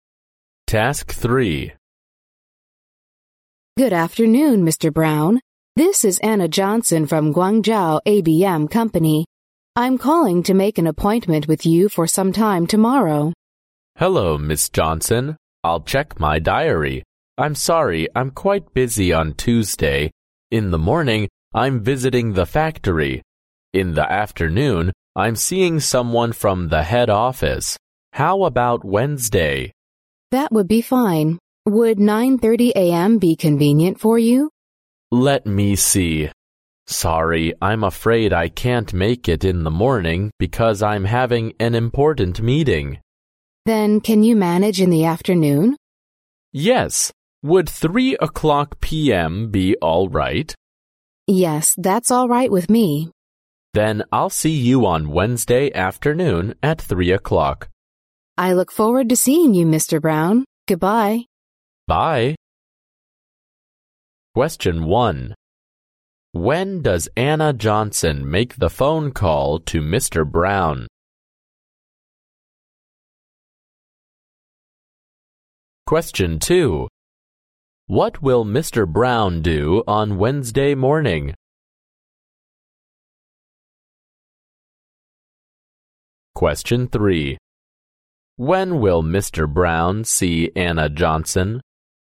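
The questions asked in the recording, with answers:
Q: What will Mr. Brown do on Wednesday morning?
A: Have an important meeting

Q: When will Mr. Brown see Anna Johnson?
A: On Wednesday afternoon at 3 o'clock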